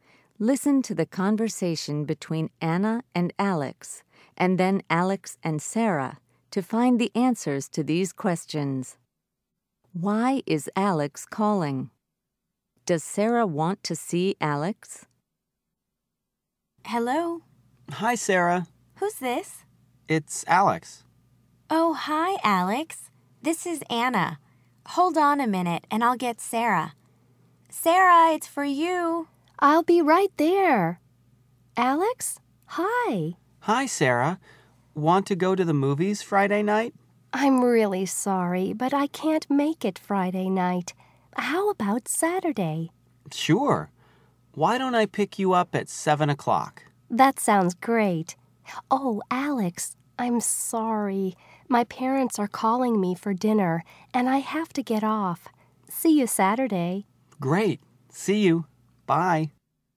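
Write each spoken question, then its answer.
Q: Why is Alex calling?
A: To ask Sarah to go to the movies

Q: Does Sarah want to see Alex?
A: Yes, on Saturday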